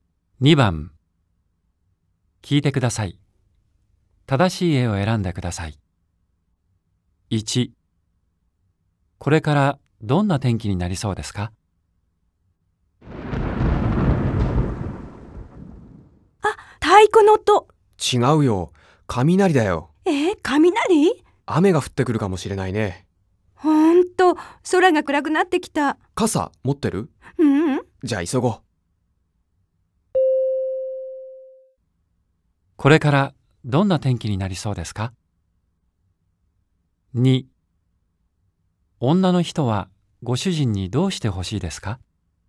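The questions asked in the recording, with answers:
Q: これからどんな天気になりそうですか?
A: 雨が降りそう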